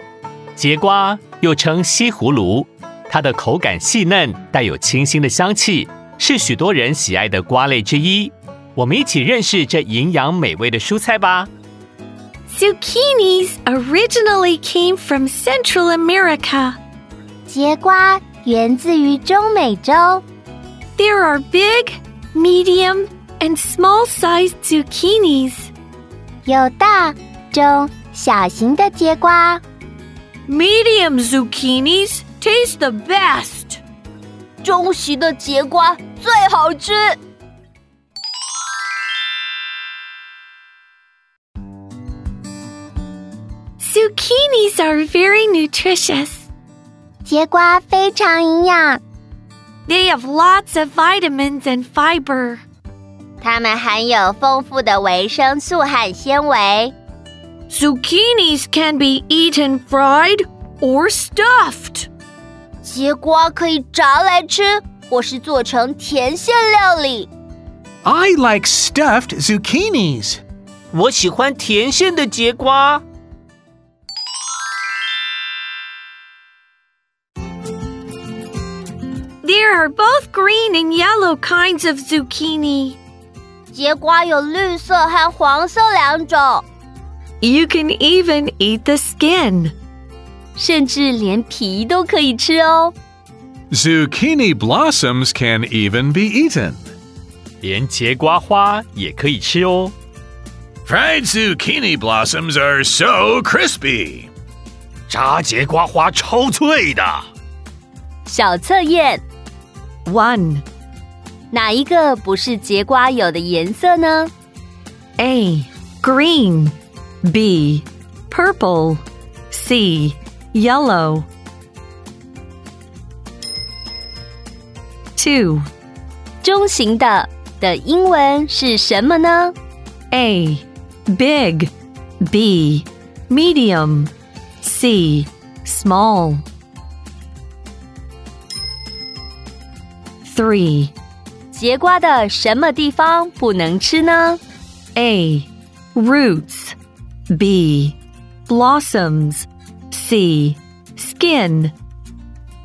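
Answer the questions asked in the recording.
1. B: Purple
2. B: Medium
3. A: Roots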